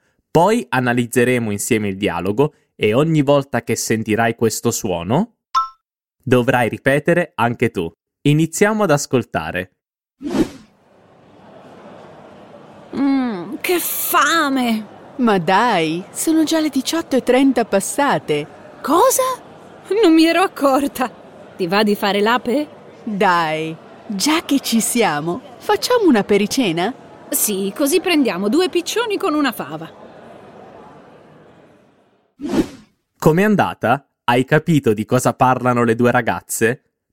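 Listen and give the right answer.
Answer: Di cosa fare per cena: decidono di fare un'apericena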